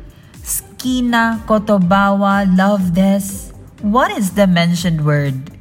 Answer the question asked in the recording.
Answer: You're correct. It's love.